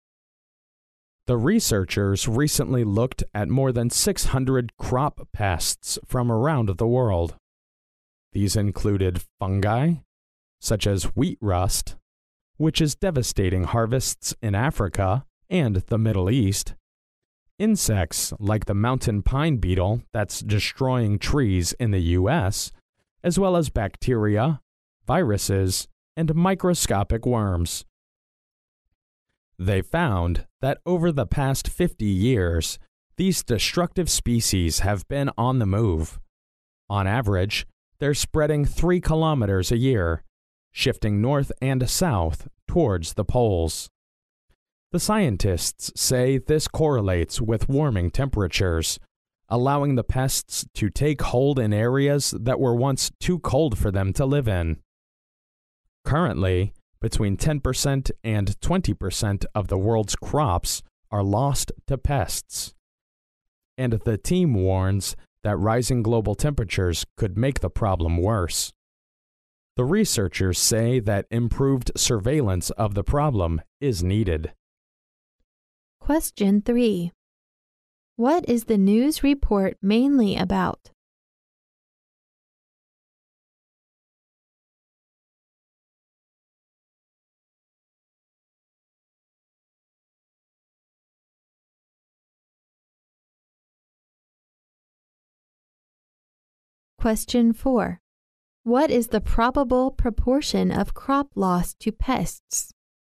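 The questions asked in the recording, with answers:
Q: What is the news report mainly about?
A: Crop pests are spreading towards the poles as global temperatures rise

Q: What is the probable proportion of crop loss to pests?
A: Between 10% and 20% of the world's crops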